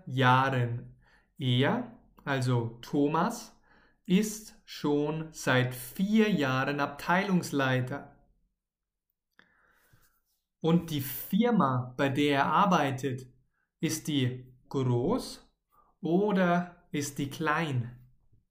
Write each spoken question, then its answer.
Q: Und die Firma, bei der er arbeitet, ist die groß oder ist die klein?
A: Die ist groß, sehr, sehr groß, nicht klein.